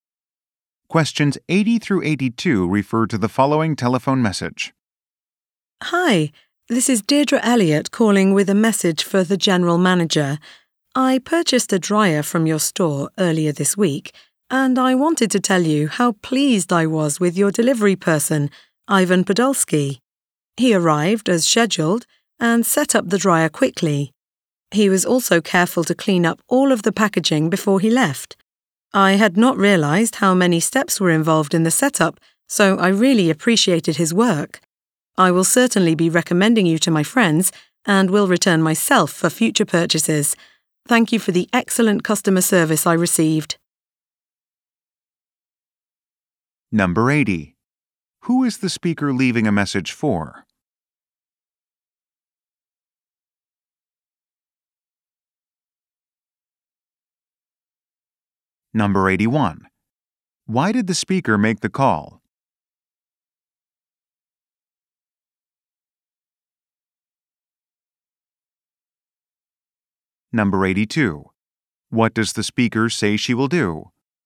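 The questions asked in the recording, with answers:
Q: Who is the speaker leaving a message for?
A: The general manager

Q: Why did the speaker make the call?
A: To praise the delivery person, Ivan Podolsky

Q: What does the speaker say she will do?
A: Recommend the store to friends and come back for future purchases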